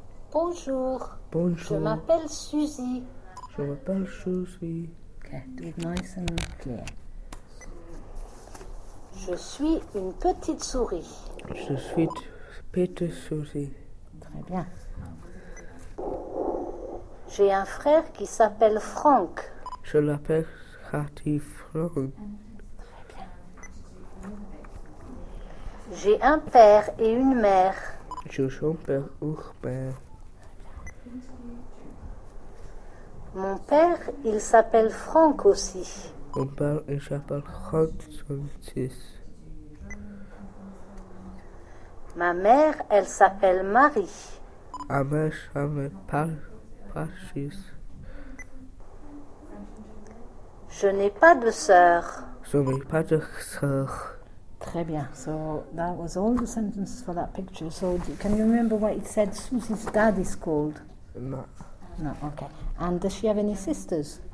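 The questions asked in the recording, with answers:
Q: And does she have any sisters?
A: No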